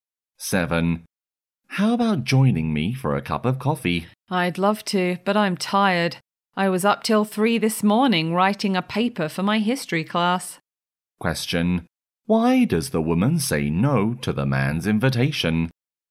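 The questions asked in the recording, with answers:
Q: Why does the woman say no to the man's invitation?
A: She is tired because she stayed up till 3 writing a paper.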